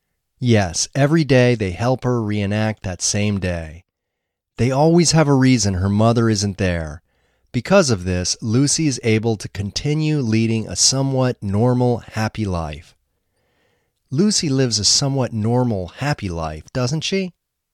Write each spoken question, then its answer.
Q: Lucy lives a somewhat normal, happy life, doesn't she?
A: Yes, she lives a somewhat normal, happy life.